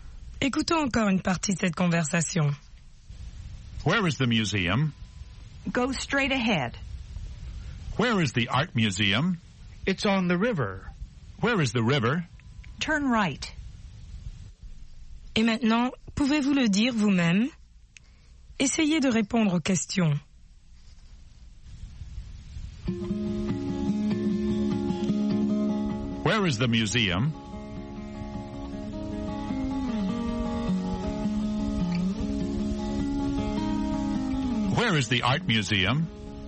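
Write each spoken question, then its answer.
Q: Where is the museum?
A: Go straight ahead.

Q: Where is the art museum?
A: It's on the river.

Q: Where is the river?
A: Turn right.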